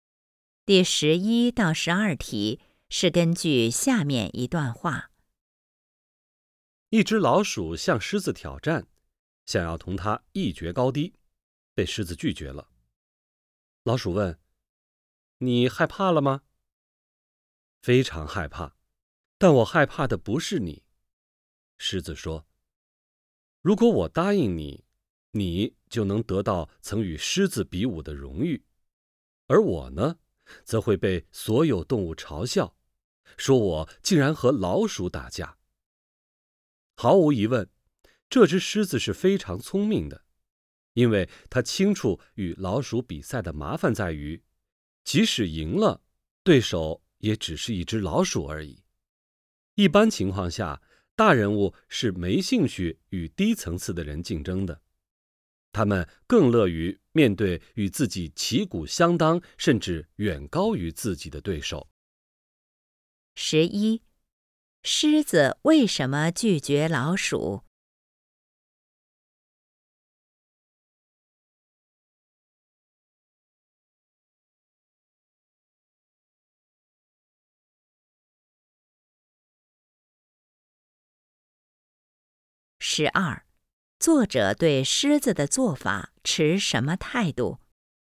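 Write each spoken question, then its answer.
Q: 狮子为什么拒绝老鼠?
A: 怕被所有动物嘲笑和老鼠打架

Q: 作者对狮子的做法持什么态度?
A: 赞同,认为狮子很聪明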